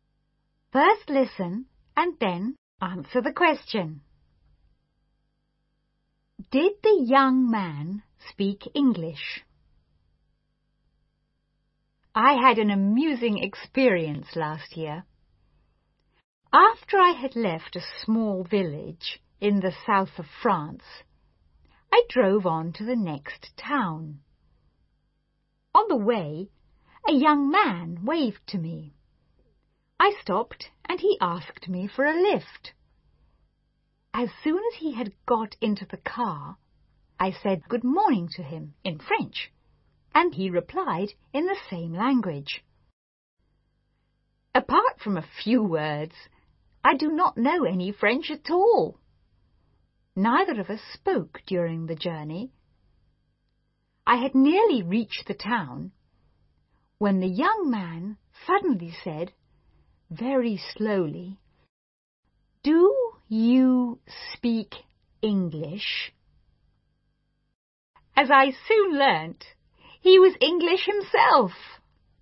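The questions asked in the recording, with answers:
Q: Did the young man speak English?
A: Yes, he was English himself.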